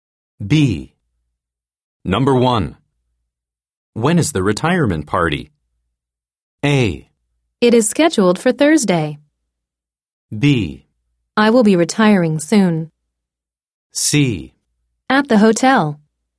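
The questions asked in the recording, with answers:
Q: When is the retirement party?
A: A: It is scheduled for Thursday.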